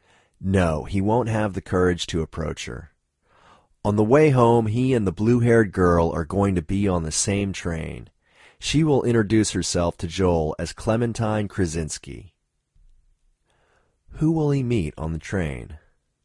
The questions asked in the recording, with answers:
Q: Who will he meet on the train?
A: He'll meet the girl with blue hair on the train.